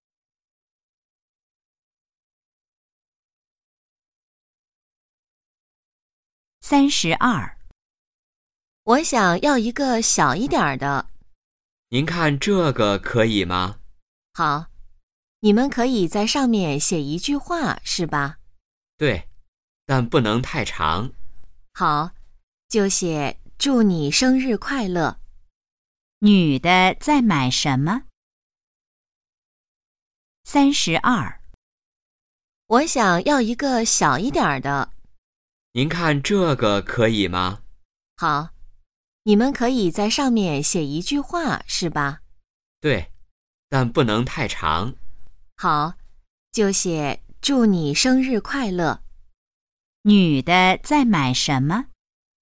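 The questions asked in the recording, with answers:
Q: 女的在买什么?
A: 生日蛋糕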